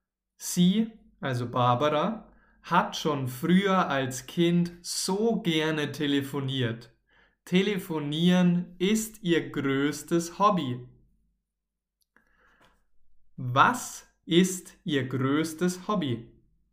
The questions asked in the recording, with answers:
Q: Was ist ihr größtes Hobby?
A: Telefonieren. Telefonieren ist ihr allergrößtes Hobby.